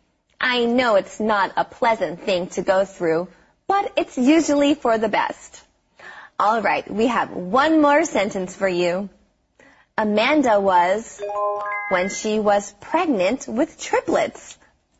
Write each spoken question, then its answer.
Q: Amanda was when she was pregnant with triplets.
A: Amanda was enormous when she was pregnant with triplets.